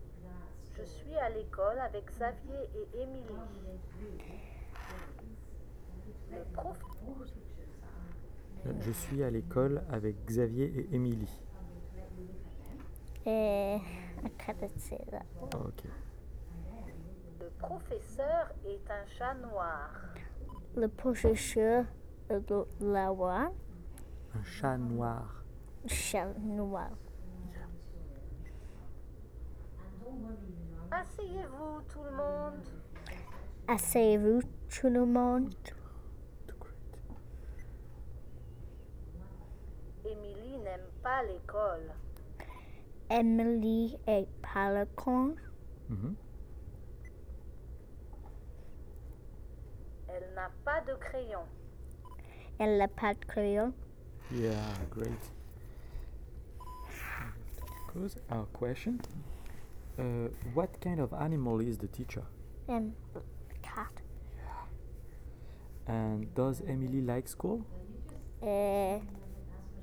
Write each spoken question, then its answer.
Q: What kind of animal is the teacher?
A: Cat.

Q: And does Emily like school?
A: No.